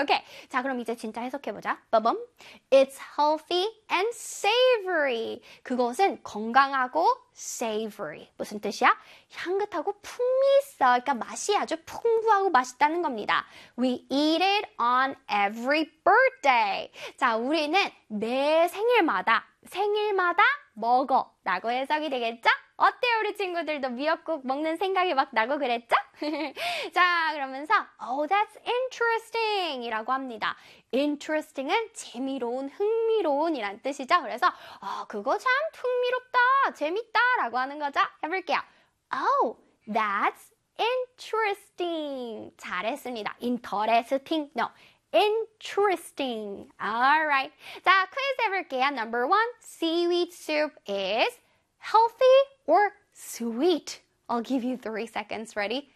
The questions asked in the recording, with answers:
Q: seaweed soup is healthy or sweet?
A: 정답은 바로 healthy죠.